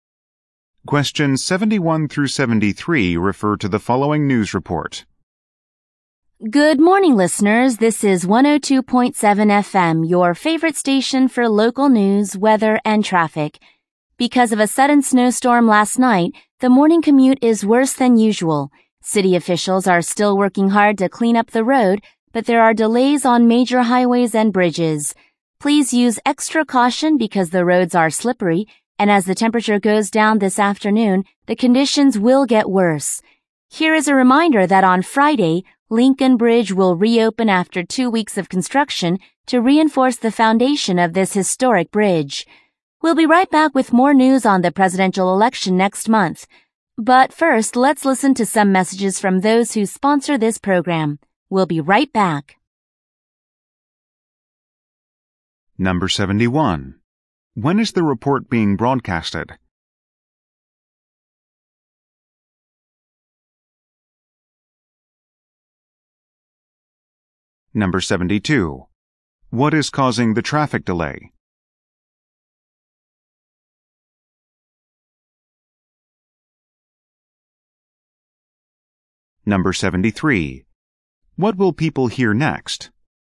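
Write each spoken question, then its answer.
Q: When is the report being broadcasted?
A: In the morning

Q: What is causing the traffic delay?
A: A snowstorm

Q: What will people hear next?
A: Messages from sponsors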